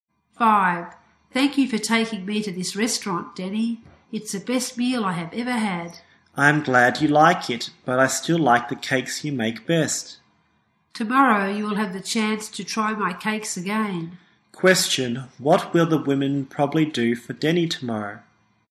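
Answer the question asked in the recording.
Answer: Make cakes for him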